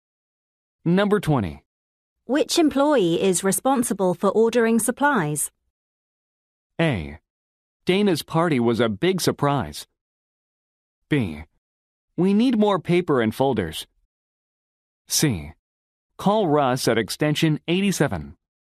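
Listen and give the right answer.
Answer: C: Call Russ at extension 87.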